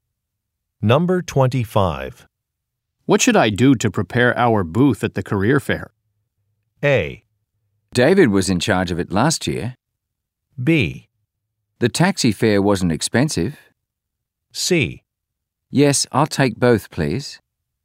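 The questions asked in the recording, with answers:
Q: What should I do to prepare our booth at the career fair?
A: A: David was in charge of it last year.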